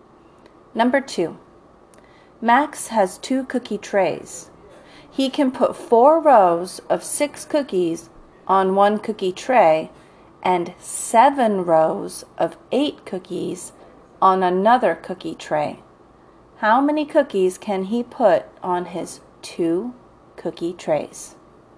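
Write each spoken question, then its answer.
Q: How many cookies can he put on his 2 cookie trays?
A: 80 cookies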